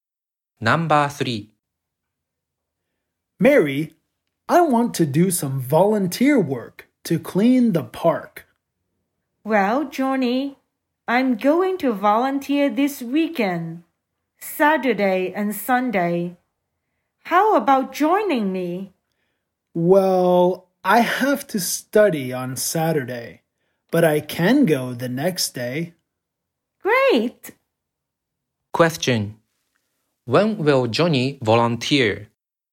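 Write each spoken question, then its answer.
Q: Question.When will Johnny volunteer?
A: On Sunday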